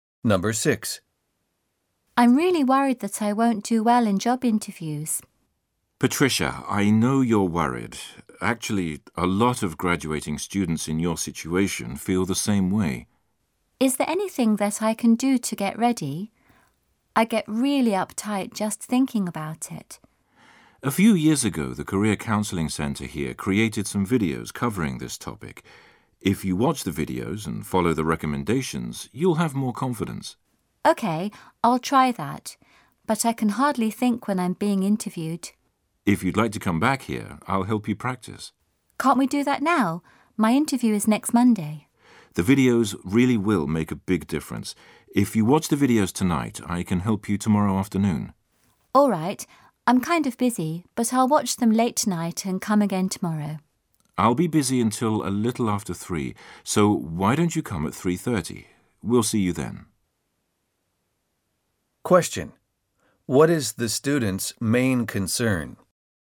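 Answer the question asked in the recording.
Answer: Not doing well in job interviews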